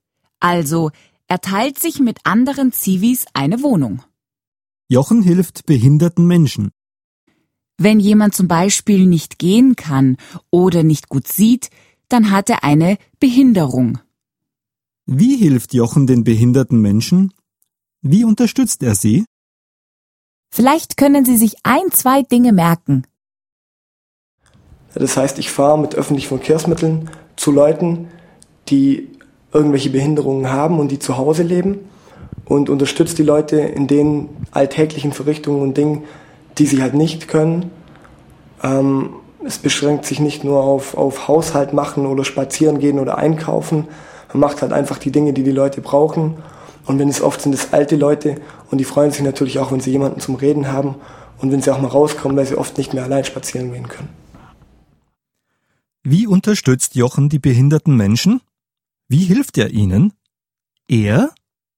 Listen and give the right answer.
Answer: Er macht den Haushalt.